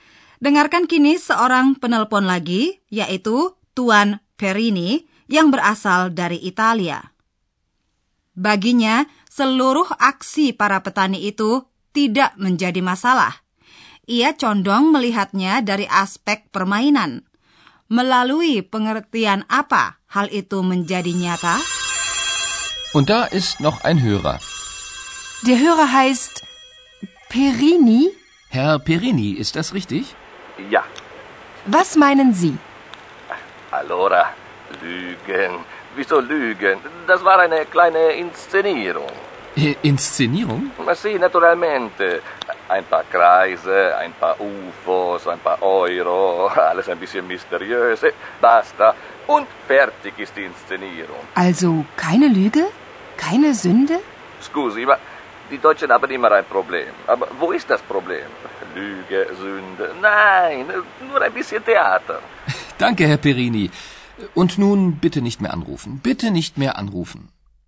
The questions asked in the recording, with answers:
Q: Melalui pengertian apa hal itu menjadi nyata?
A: Saya yakin Anda dapat menangkap istilah pementasan, inscenirum, yang dipakai Tuan Perini untuk menggambarkan aksi tersebut.